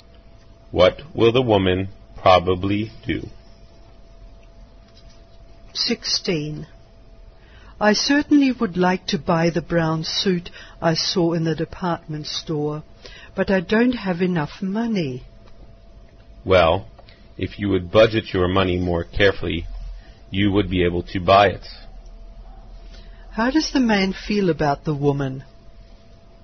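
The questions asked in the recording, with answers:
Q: How does the man feel about the woman?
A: She should budget her money more carefully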